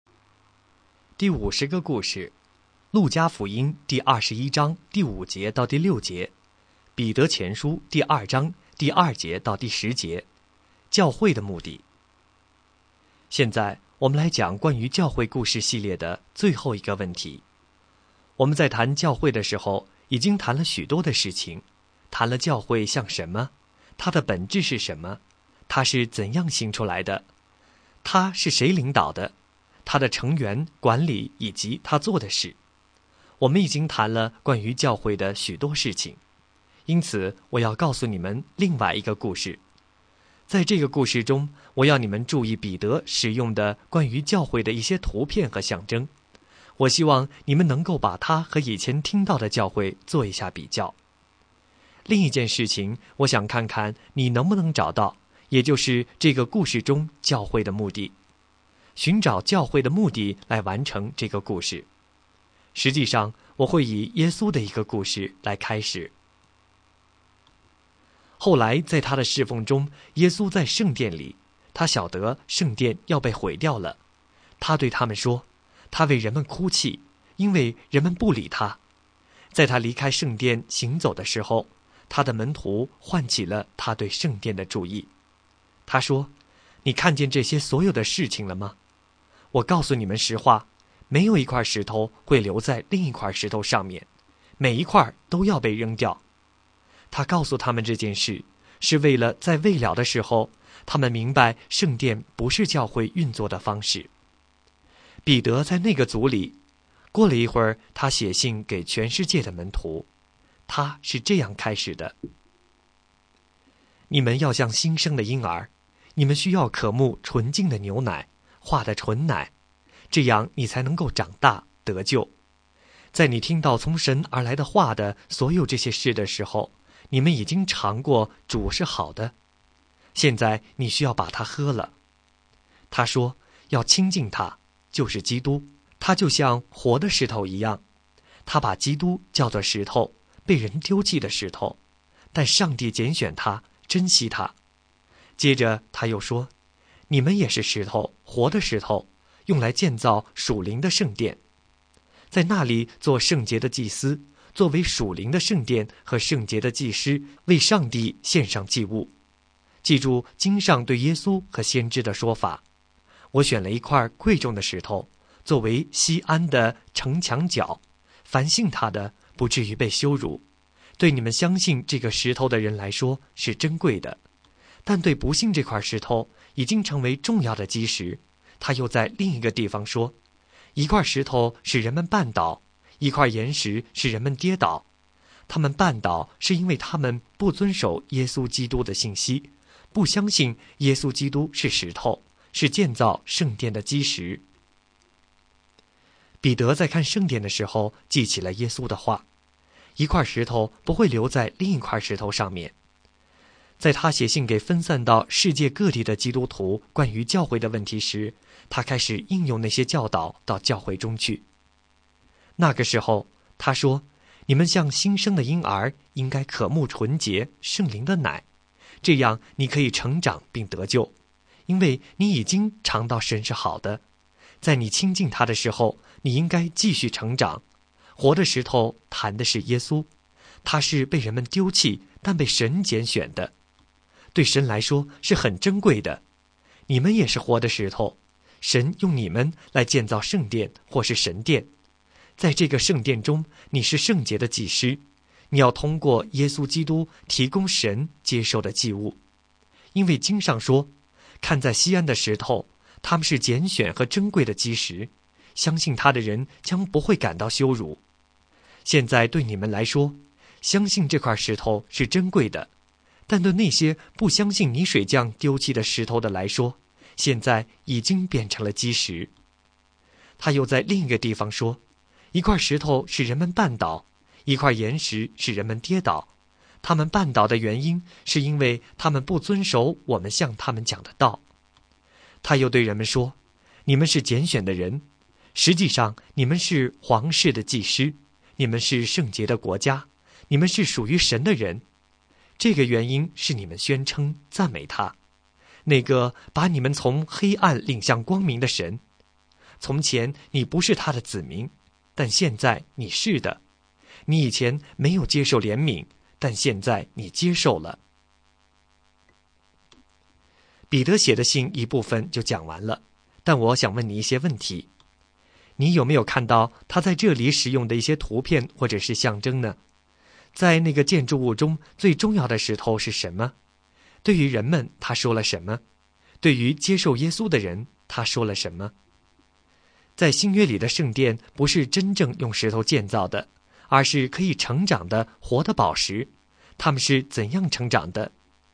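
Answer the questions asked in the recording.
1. 基石,也就是耶稣基督
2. 像新生的婴儿一样,渴慕纯净的灵奶(神的话)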